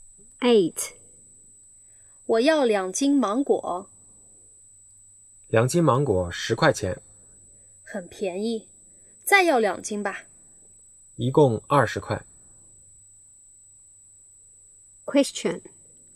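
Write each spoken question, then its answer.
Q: 女的买多少斤芒果?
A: 四斤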